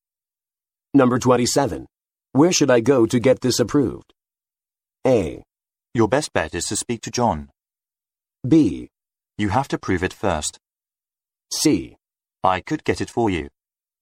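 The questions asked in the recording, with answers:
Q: Where should I go to get this approved?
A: A: Your best bet is to speak to John.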